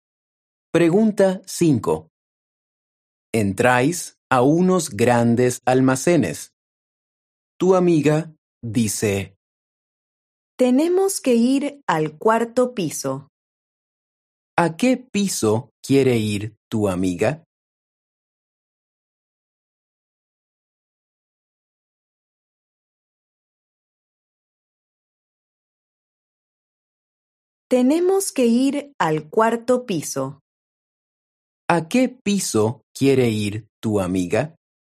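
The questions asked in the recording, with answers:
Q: ¿A qué piso quiere ir tu amiga?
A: al cuarto piso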